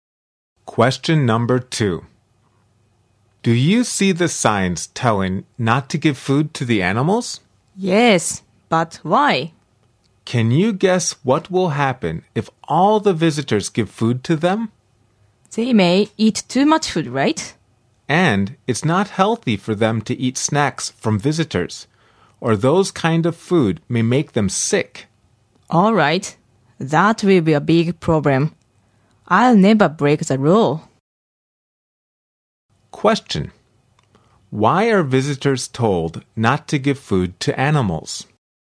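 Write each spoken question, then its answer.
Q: Why are visitors told not to give food to animals?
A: The animals may eat too much, and visitors' food can be unhealthy and make them sick.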